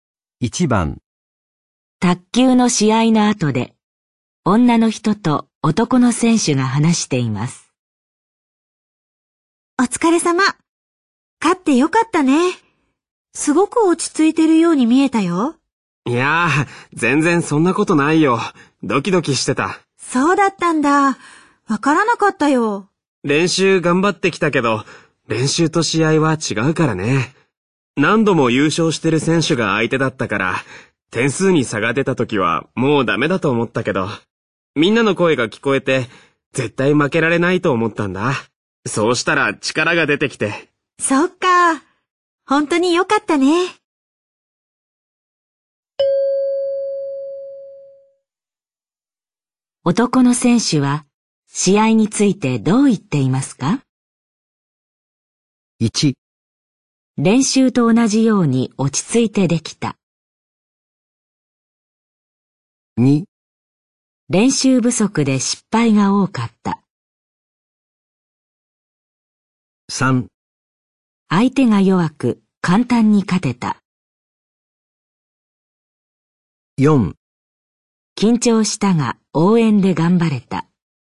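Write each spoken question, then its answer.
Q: 男の選手は試合についてどう言っていますか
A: 4: 緊張したが応援で頑張れた。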